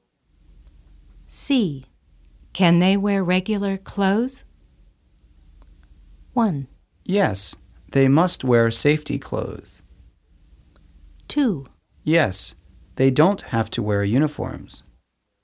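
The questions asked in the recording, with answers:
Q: Can they wear regular clothes?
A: 2: Yes, they don't have to wear uniforms.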